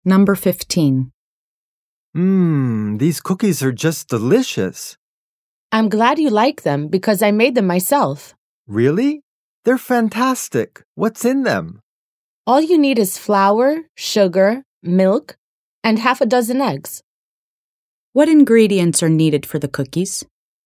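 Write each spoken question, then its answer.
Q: What ingredients are needed for the cookies?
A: Flour, sugar, milk, and half a dozen eggs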